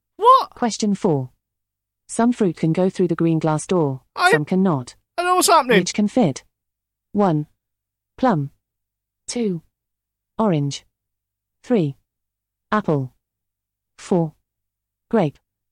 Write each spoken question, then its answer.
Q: Which can fit?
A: The correct answer is 3. Apple.